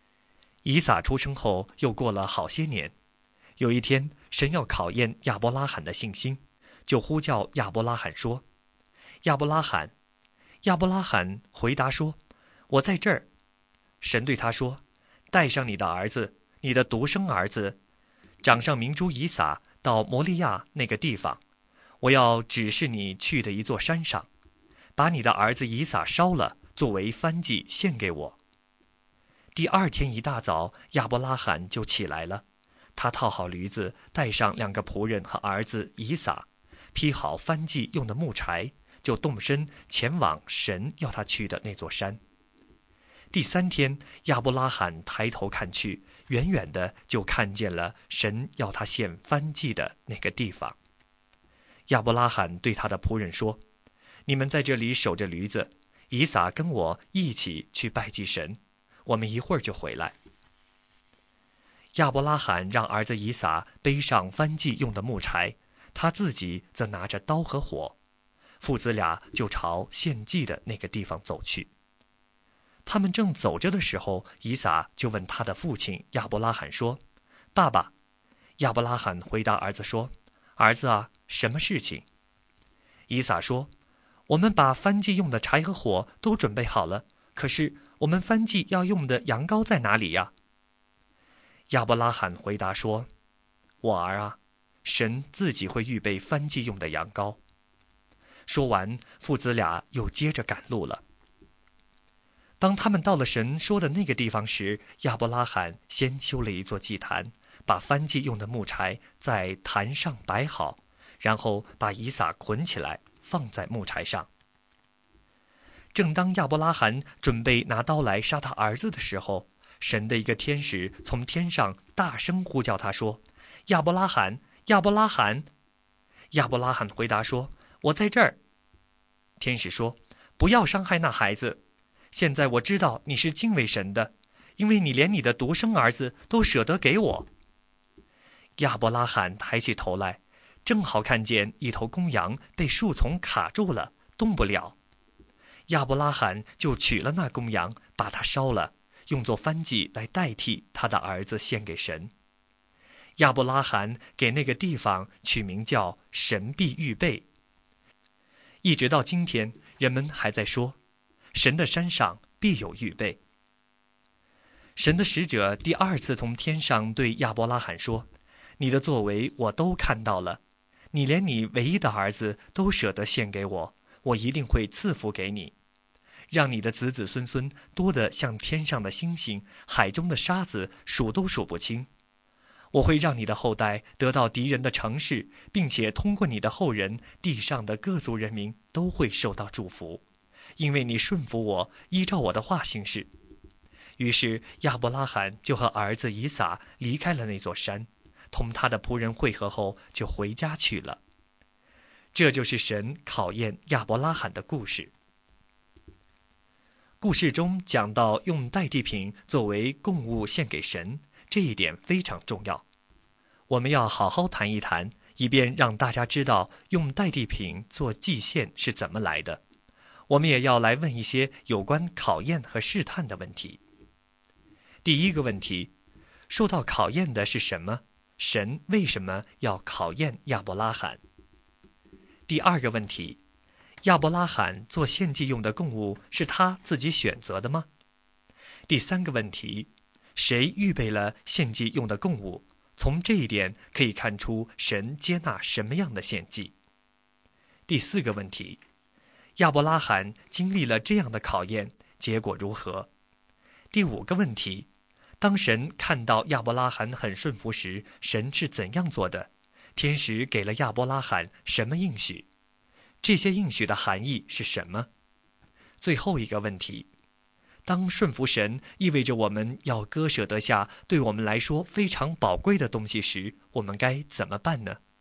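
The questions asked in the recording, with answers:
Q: 受到考验的是什么?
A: 亚伯拉罕的信心

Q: 亚伯拉罕做献祭用的供物是他自己选择的吗?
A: 不是,是神预备的

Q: 亚伯拉罕经历了这样的考验,结果如何?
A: 神用一头公羊代替以撒,并赐福给亚伯拉罕

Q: 当神看到亚伯拉罕很顺服时,神是怎样做的?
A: 神让他用公羊代替以撒献祭,并赐福给他

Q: 天使给了亚伯拉罕什么应许?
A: 子孙多得像天上的星星、海中的沙子;后代得到敌人的城市;地上各族人民都会通过他的后人受到祝福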